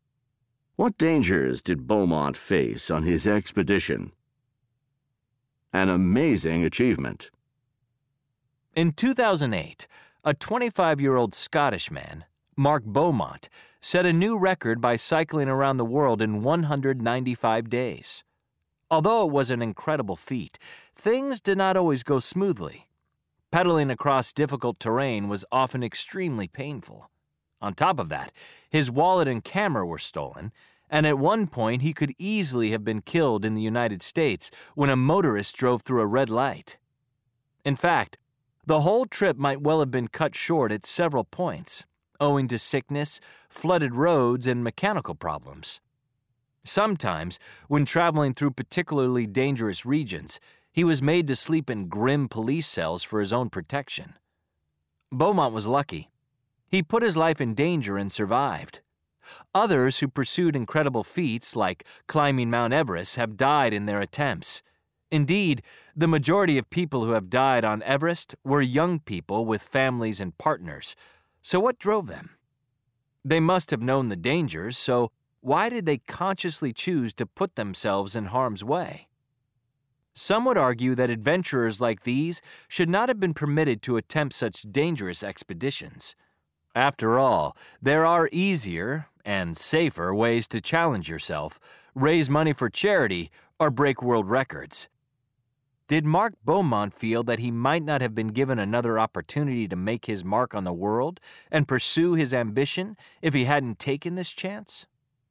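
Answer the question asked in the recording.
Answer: Painful terrain, theft of his wallet and camera, nearly being killed by a motorist, sickness, flooded roads, mechanical problems, and dangerous regions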